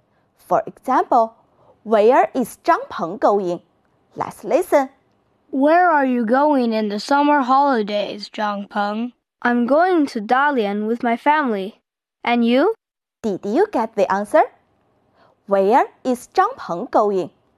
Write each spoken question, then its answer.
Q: Where is Zhang Peng going?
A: He is going to Dalian.